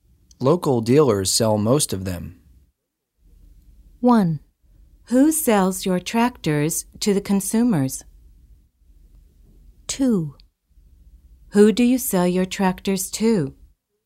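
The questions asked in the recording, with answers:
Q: Local dealers sell most of them.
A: 1: Who sells your tractors to the consumers?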